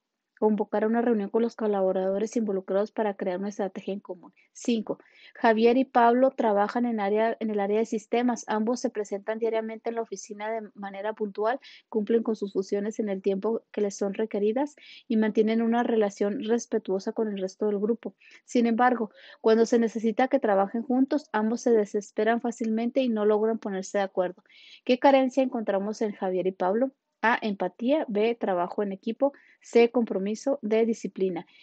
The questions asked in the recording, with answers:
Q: ¿Qué carencia encontramos en Javier y Pablo?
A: Y la respuesta correcta es la B, trabajo en equipo.